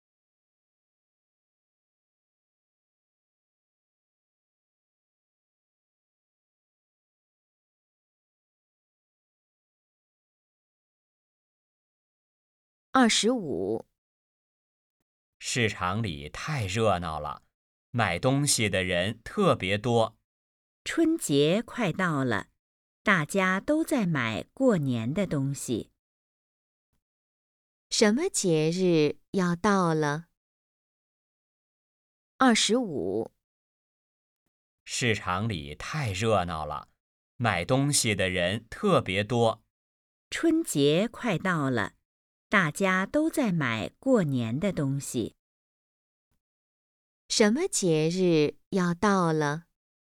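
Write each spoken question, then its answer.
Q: 什么节日要到了?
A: 春节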